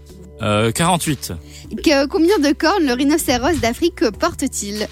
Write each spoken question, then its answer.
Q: Combien de cornes le rhinocéros d'Afrique porte-t-il?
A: 2. Une devant, une derrière.